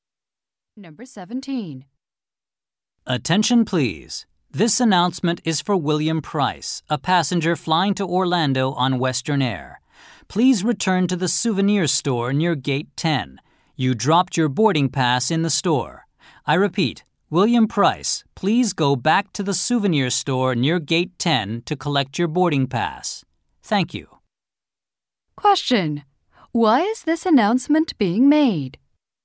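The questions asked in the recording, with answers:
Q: Why is this announcement being made?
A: William Price dropped his boarding pass in the souvenir store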